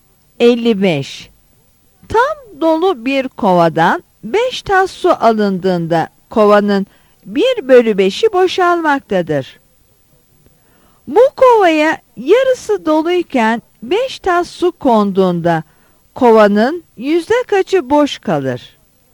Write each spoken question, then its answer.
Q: Bu kovaya yarısı doluyken 5 tas su konduğunda kovanın yüzde kaçı boş kalır?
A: Yanıt C'dir.